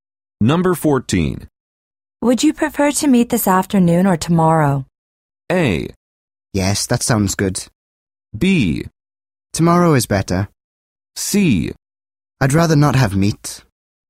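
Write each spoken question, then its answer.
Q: Would you prefer to meet this afternoon or tomorrow?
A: B: Tomorrow is better.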